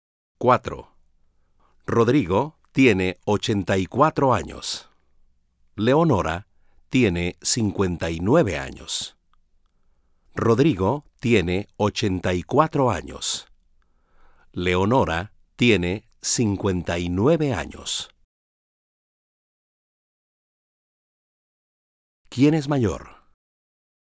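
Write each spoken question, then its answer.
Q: ¿Quién es mayor?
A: Rodrigo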